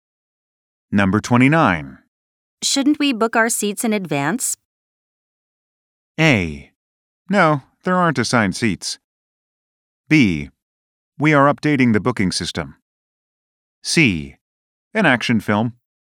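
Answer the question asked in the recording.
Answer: A: No, there aren't assigned seats.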